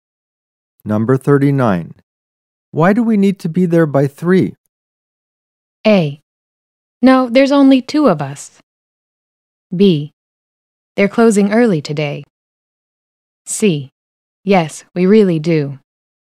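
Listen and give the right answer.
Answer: B: They're closing early today.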